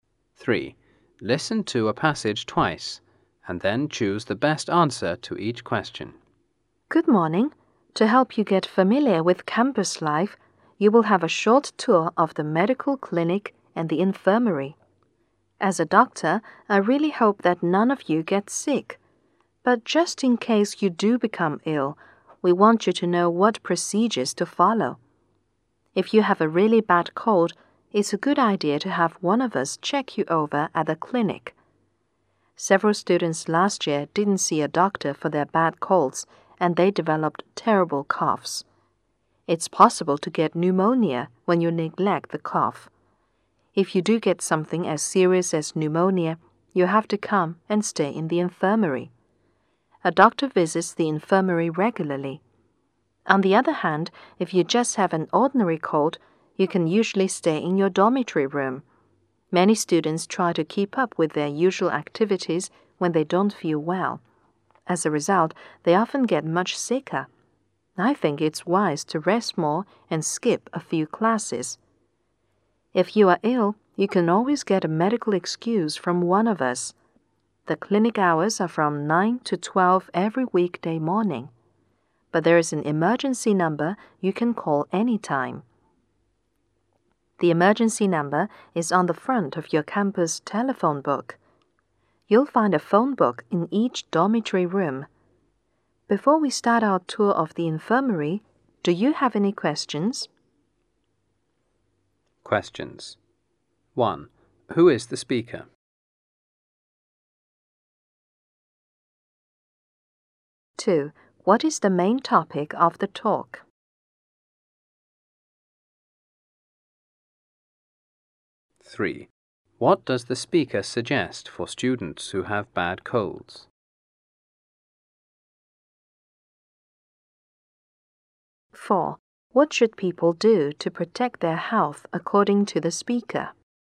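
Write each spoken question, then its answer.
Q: Who is the speaker?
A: A doctor

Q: What is the main topic of the talk?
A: The campus medical services and what to do when students get sick

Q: What does the speaker suggest for students who have bad colds?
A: Have a doctor check them over at the clinic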